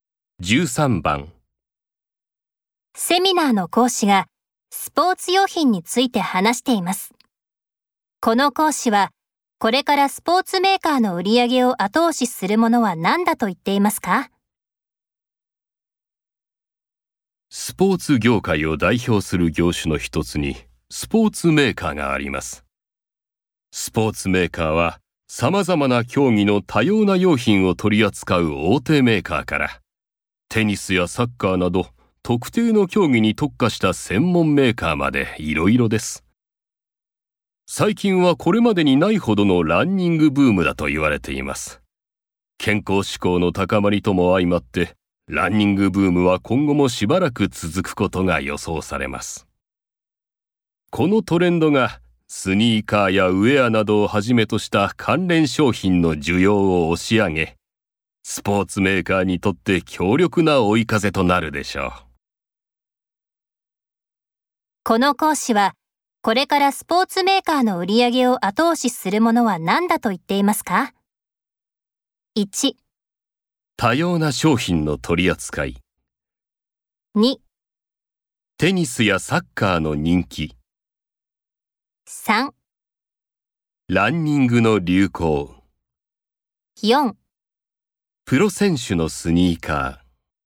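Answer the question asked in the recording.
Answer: 3: ランニングの流行。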